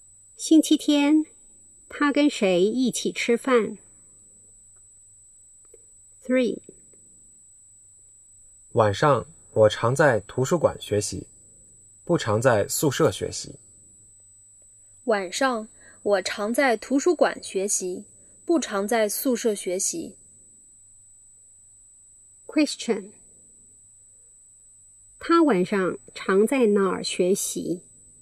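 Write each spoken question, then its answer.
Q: 他晚上常在哪儿学习?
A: 图书馆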